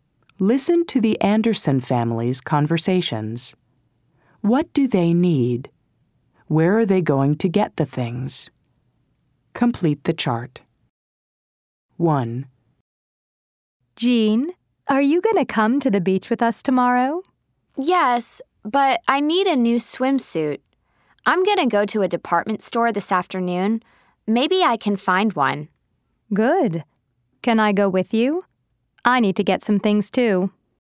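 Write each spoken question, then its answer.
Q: What do they need?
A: A new swimsuit

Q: Where are they going to get the things?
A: At a department store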